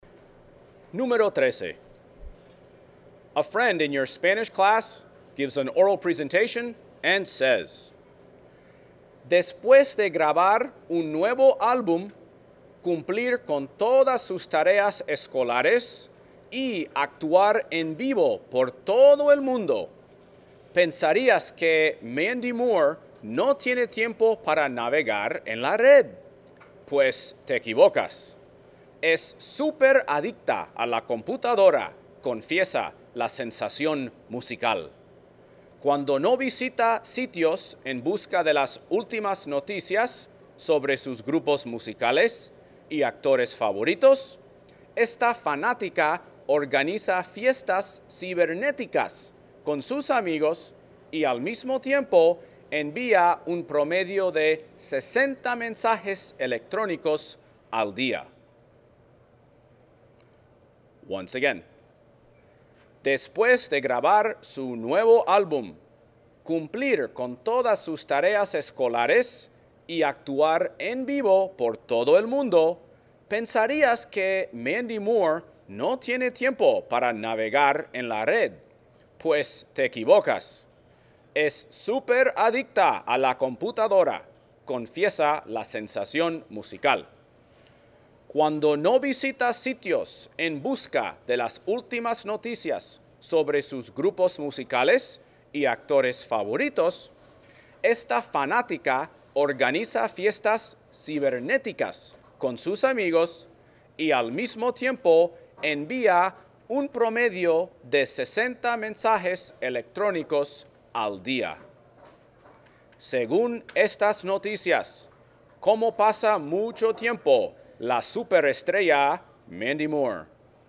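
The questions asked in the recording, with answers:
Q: Según estas noticias, ¿cómo pasa mucho tiempo la superestrella Mandy Moore?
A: Usando la computadora: navega en la red y envía mensajes electrónicos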